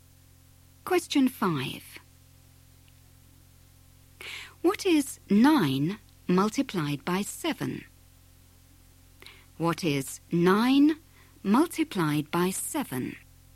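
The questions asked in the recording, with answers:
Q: What is 9 multiplied by 7?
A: 63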